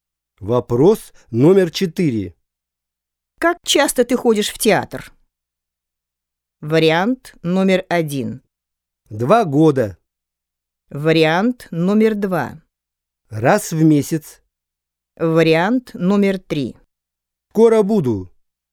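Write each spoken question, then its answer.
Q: Как часто ты ходишь в театр?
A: 2: Раз в месяц.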